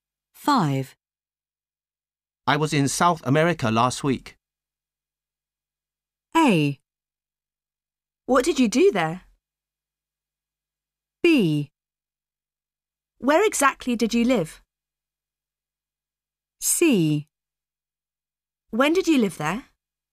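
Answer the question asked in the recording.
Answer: A: What did you do there?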